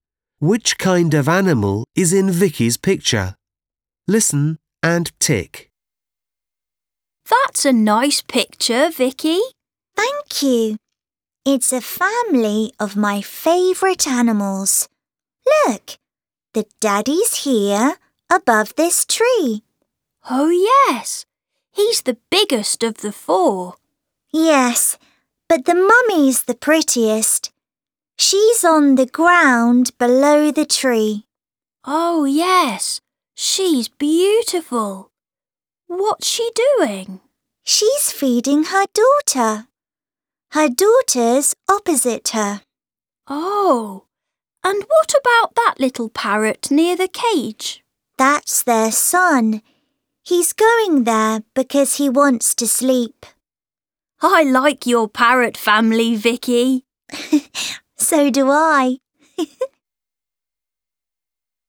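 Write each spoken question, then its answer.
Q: Which kind of animal is in Vicky's picture?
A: parrots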